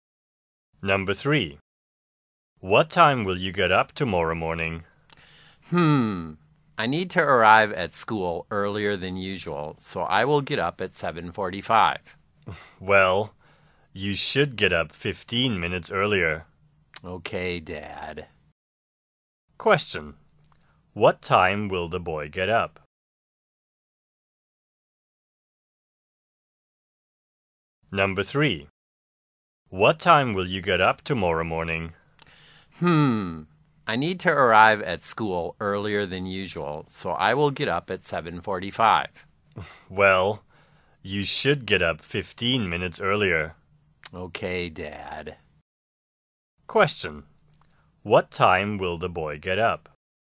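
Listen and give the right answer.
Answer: At 7:30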